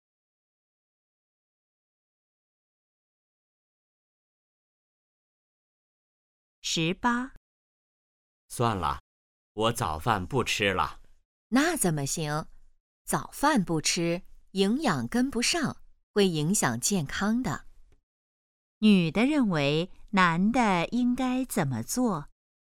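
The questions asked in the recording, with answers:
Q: 女的认为男的应该怎么做?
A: 吃早饭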